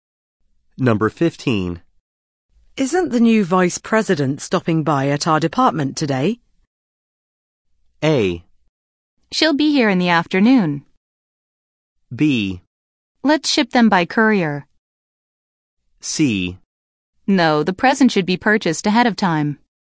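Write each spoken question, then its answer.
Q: Isn't the new vice president stopping by at our department today?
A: A: She'll be here in the afternoon.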